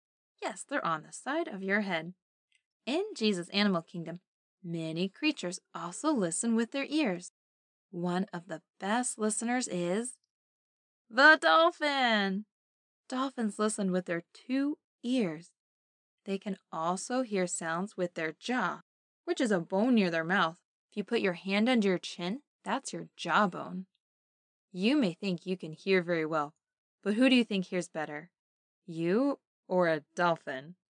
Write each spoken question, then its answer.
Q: You may think you can hear very well, but who do you think hears better? You or a dolphin?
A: Yes, dolphins can hear much better.